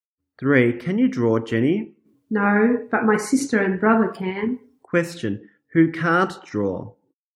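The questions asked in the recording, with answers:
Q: Who can't draw?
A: Jenny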